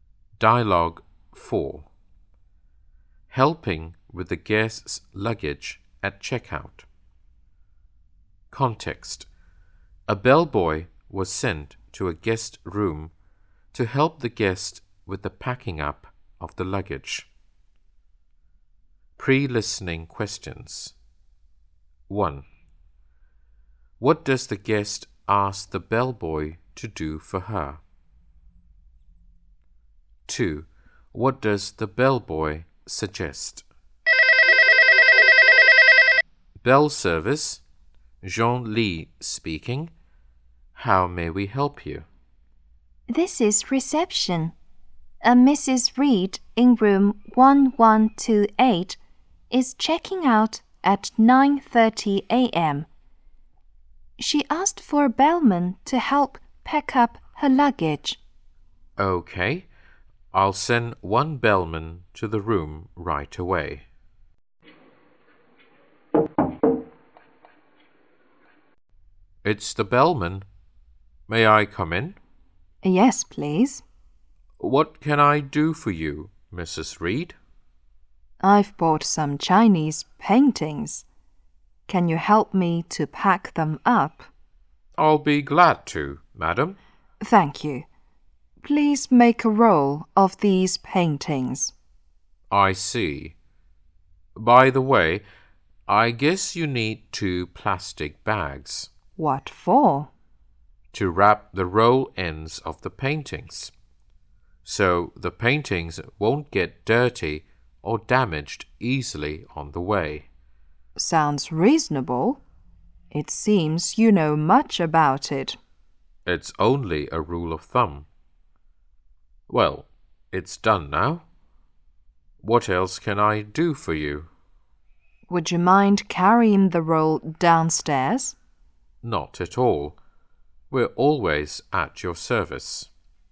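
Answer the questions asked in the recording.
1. Help pack up her Chinese paintings
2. Using two plastic bags to wrap the roll ends of the paintings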